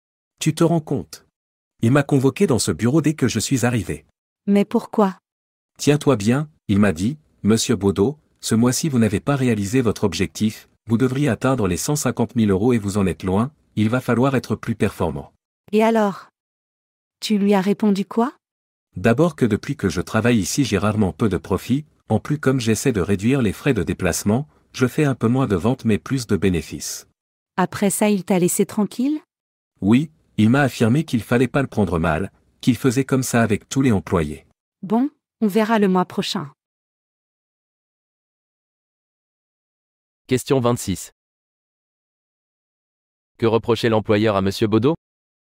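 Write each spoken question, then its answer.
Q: Que reprochait l'employeur à Monsieur Baudot?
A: De ne pas avoir atteint son objectif de ventes de 150 000 euros ce mois-ci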